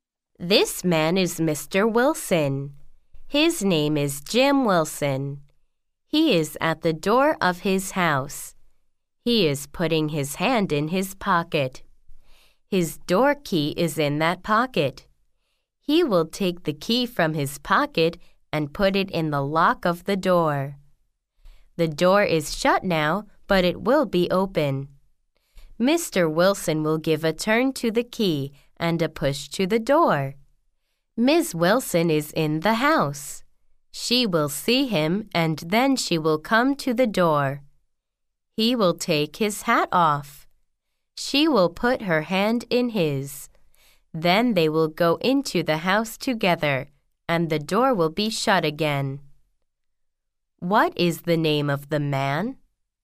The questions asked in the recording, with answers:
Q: What is the name of the man?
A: The man's name is Jim Wilson.